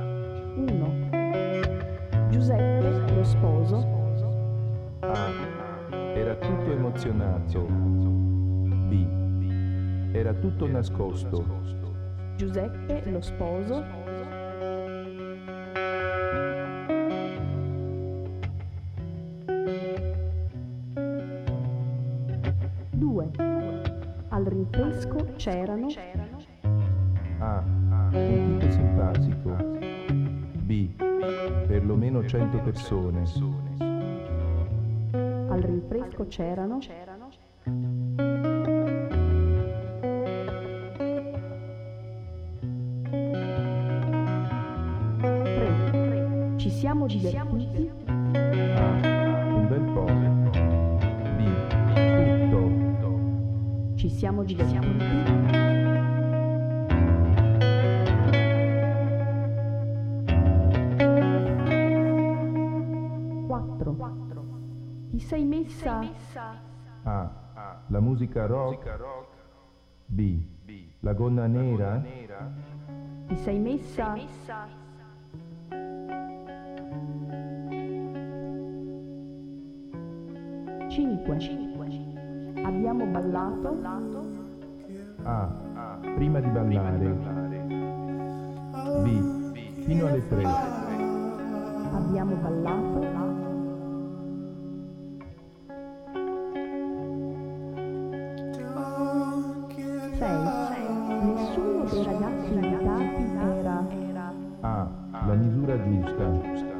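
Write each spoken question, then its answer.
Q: Giuseppe, lo sposo.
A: A: Era tutto emozionato.

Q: Rinfresco c'erano.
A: B: perlomeno 100 persone.

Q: Ti sei messa?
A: B: La gonna nera.

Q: Abbiamo ballato.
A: B: Fino alle tre.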